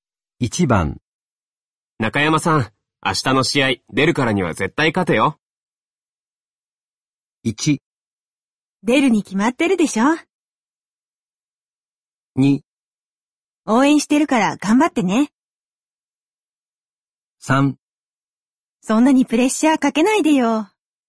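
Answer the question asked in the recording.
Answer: 3: そんなにプレッシャーかけないでよ。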